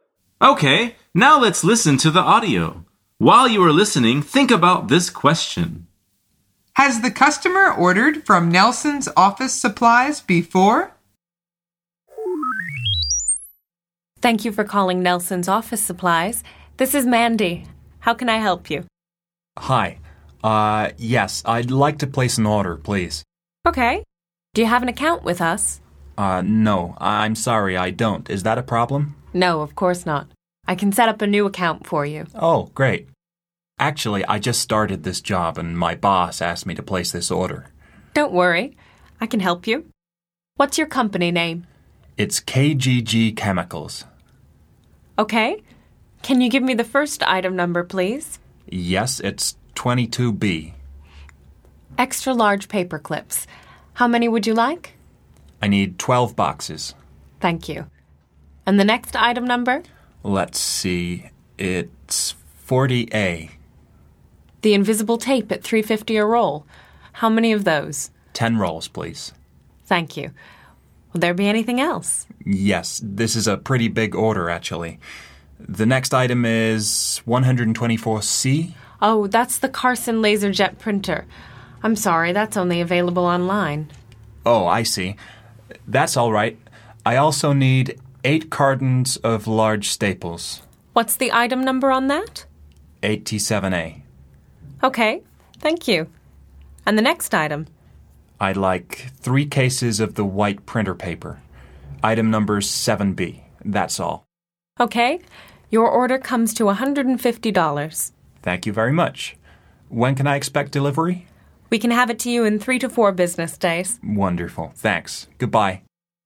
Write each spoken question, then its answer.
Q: Has the customer ordered from Nelson's Office Supplies before?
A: The answer is no. This is his first time.